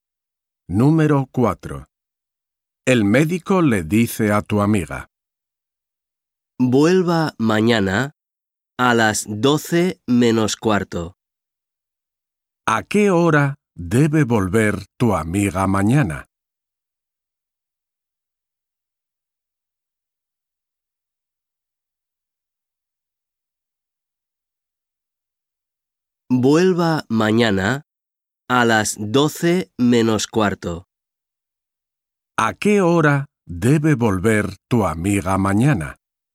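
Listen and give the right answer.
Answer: a las 12:15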